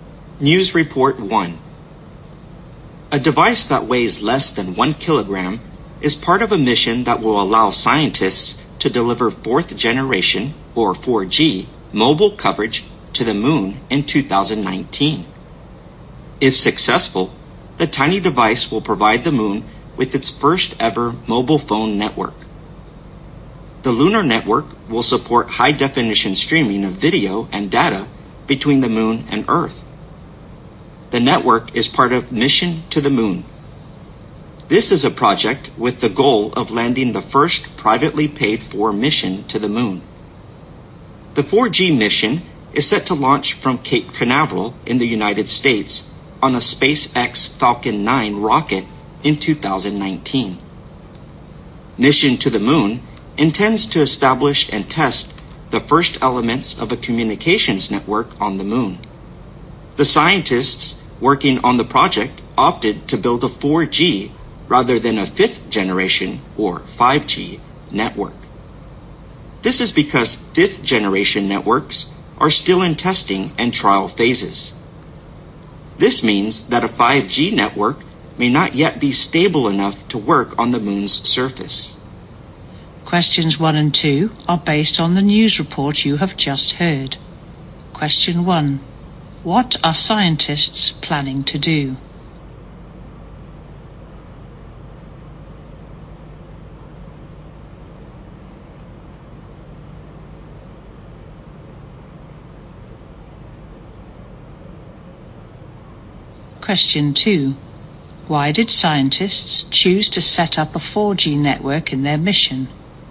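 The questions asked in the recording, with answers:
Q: What are scientists planning to do?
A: Set up a 4G mobile network on the moon in 2019

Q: Why did scientists choose to set up a 4G network in their mission?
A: 5G networks are still being tested and may not be stable enough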